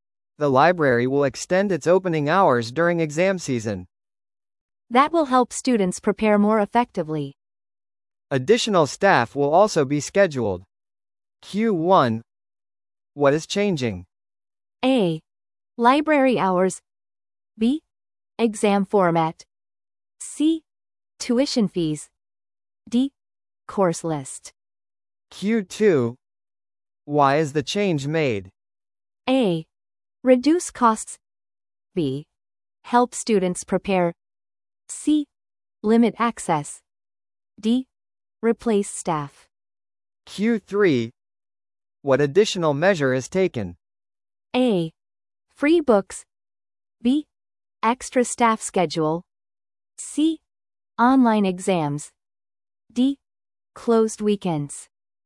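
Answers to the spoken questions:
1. A: Library hours.
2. B: Help students prepare.
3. B: Extra staff schedule.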